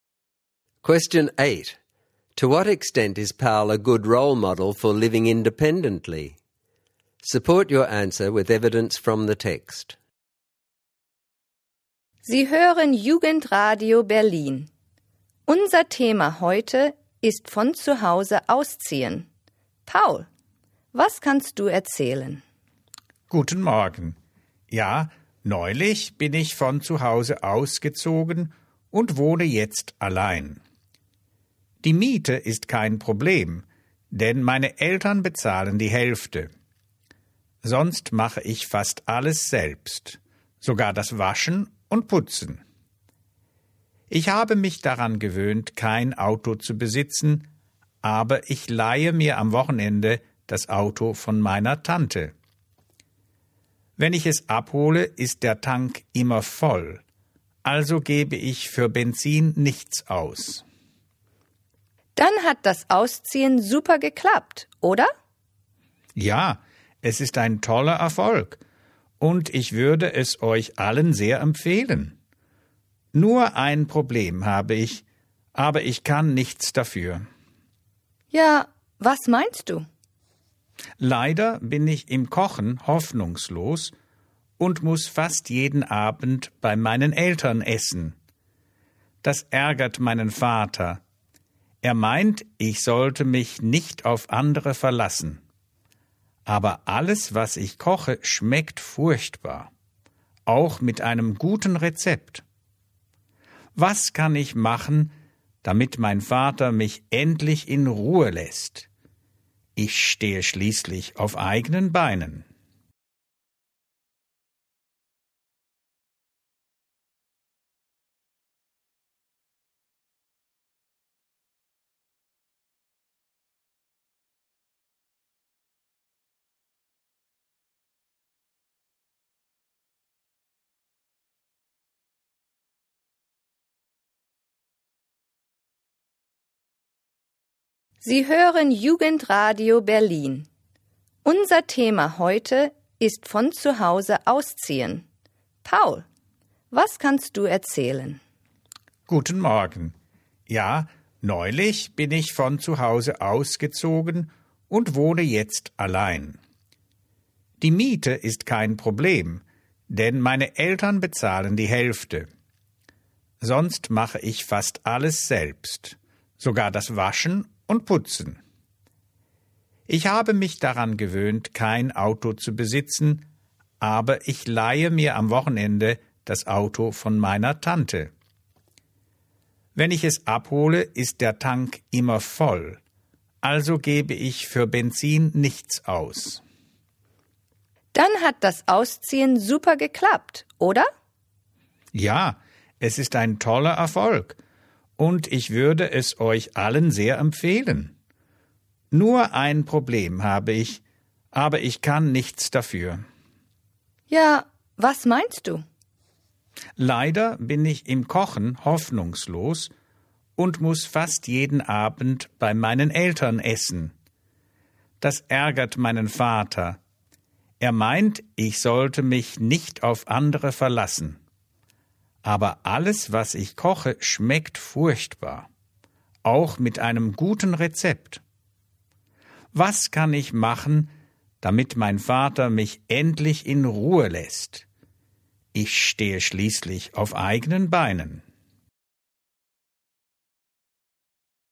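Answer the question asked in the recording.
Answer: Only partly: he washes and cleans himself, but his parents pay half the rent, he borrows his aunt's car with free fuel, and he eats at his parents' almost every night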